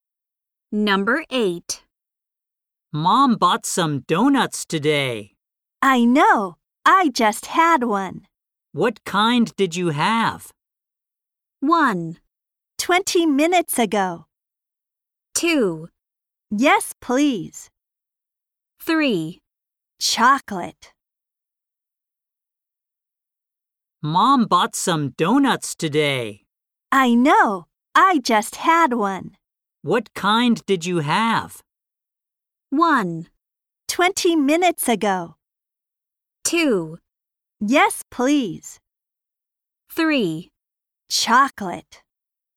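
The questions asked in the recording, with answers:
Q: What kind did you have?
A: 3: Chocolate.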